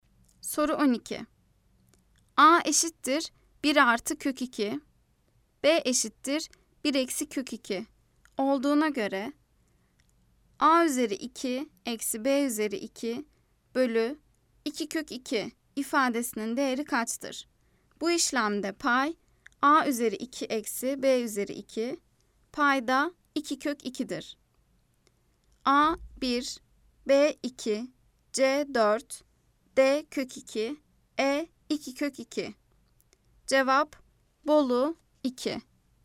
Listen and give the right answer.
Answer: Cevap Bolu 2.